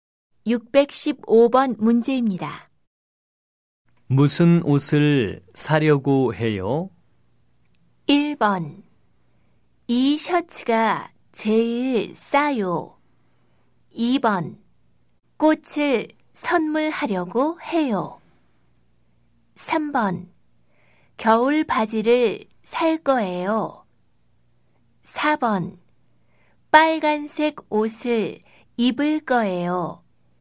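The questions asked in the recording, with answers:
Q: 무슨 옷을 사려고 해요?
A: 3: 겨울 바지를 살 거예요.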